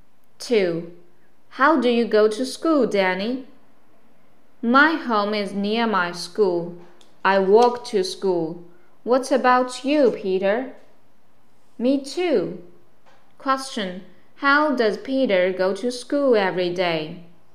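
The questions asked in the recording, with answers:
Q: Question How does Peter go to school every day?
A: He walks to school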